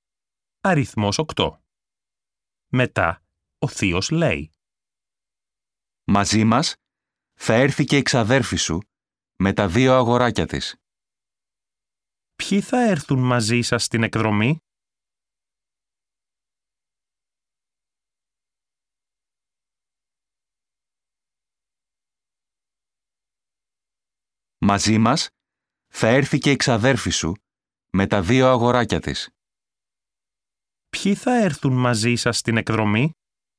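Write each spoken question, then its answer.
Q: Ποιοι θα έρθουν μαζί σας στην εκδρομή?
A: Η ξαδέρφη σου με τα δύο αγοράκια της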